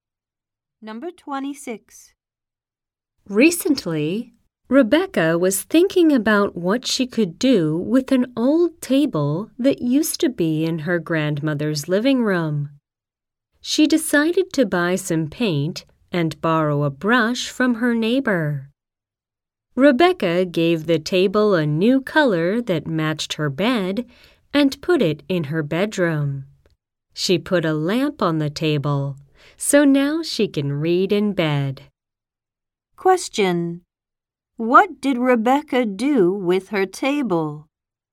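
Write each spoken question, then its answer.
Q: What did Rebecca do with her table?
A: She painted it and put it in her bedroom.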